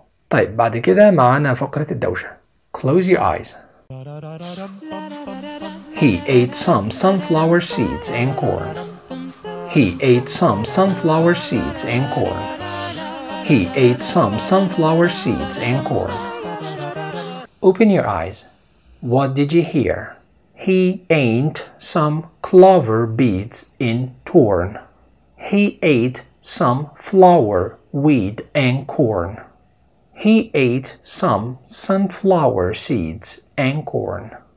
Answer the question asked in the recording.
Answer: The answer is number 3. He ate some sunflower seeds and corn.